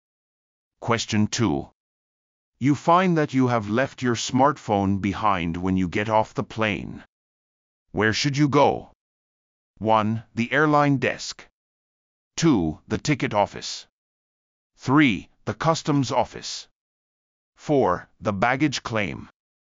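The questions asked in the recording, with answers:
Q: Where should you go?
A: 1: The airline desk.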